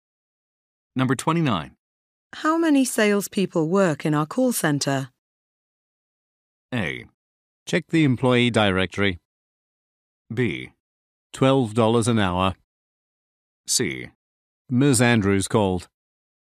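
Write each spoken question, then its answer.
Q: How many salespeople work in our call center?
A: A: Check the employee directory.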